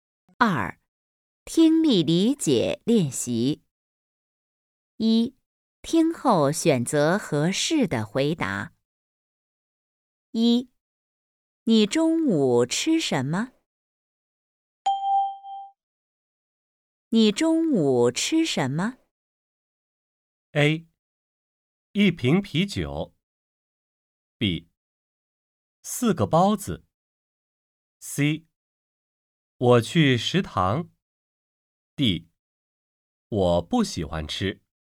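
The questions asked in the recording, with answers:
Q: 你中午吃什么?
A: B: 四个包子。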